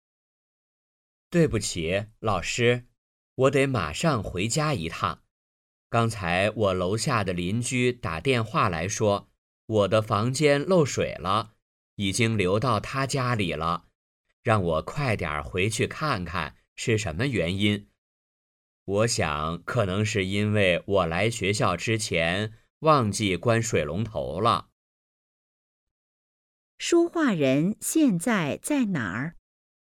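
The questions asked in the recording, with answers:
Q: 说话人现在在哪儿?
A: 在学校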